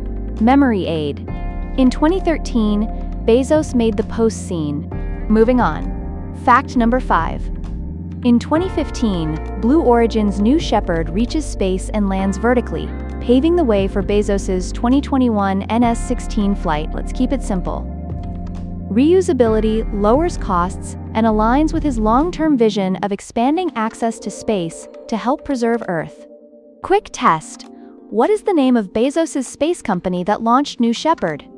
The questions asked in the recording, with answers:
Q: What is the name of Bezos's space company that launched New Shepard?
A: Correct answer. Blue Origin.